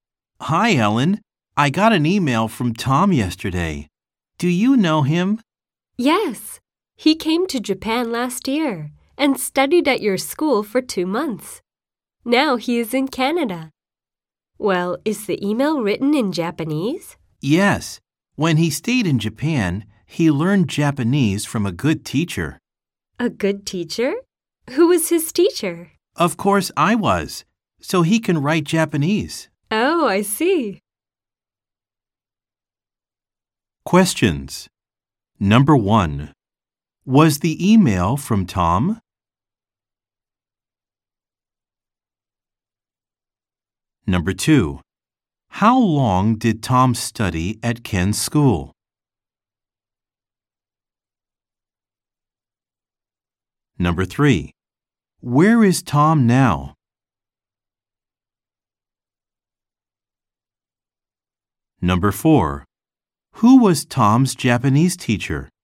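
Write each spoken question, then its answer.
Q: Was the email from Tom?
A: Yes, it was.

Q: how long did Tom study at Ken's school?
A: For two months.

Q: where is Tom now?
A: In Canada.

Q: who was Tom's Japanese teacher?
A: Ken.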